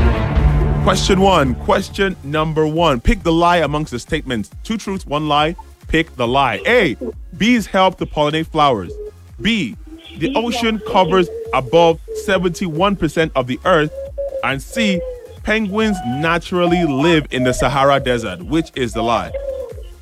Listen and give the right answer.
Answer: That is correct.